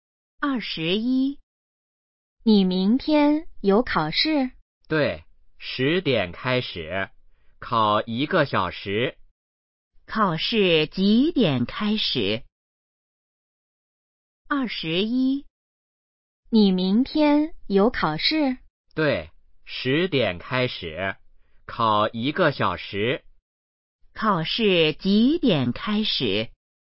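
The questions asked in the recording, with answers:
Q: 考试几点开始?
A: 十点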